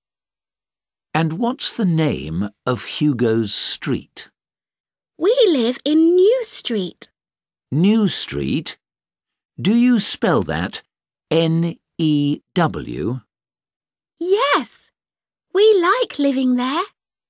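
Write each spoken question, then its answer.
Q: And what's the name of Hugo's street?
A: New Street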